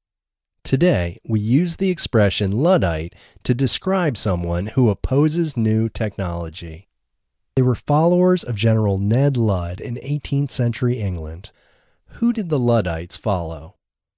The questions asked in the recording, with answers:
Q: Who did the Luddites follow?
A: The Luddites followed General Ned Ludd.